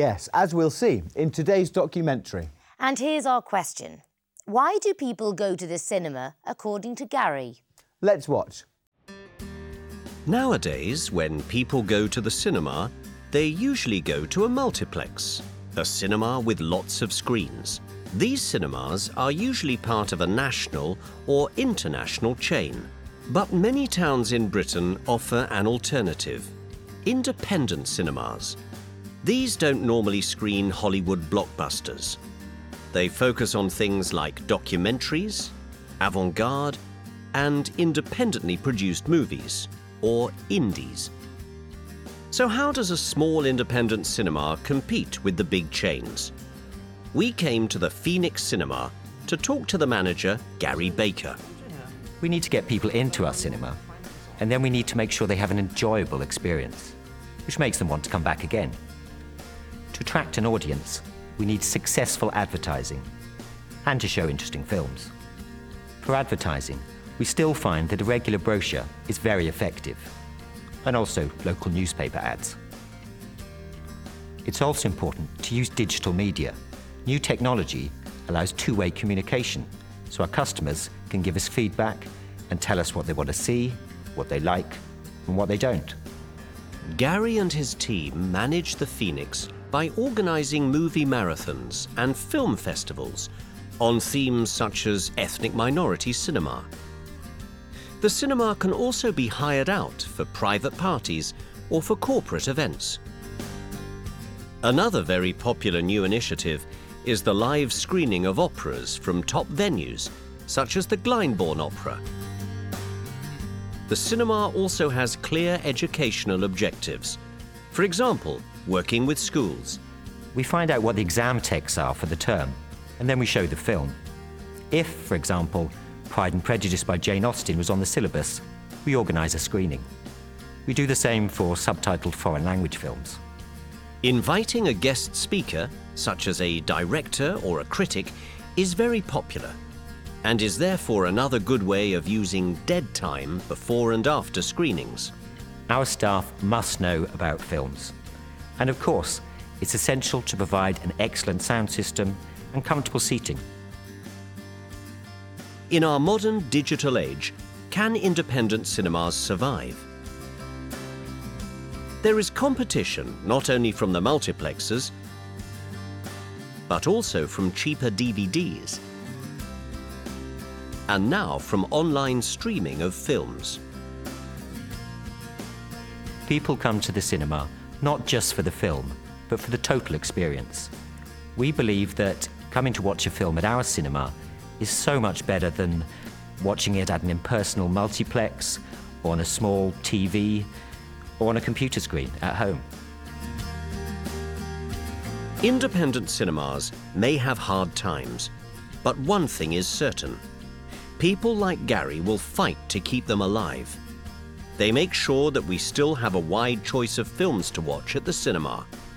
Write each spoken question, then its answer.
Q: Why do people go to the cinema, according to Gary?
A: People come to the cinema not just for the film.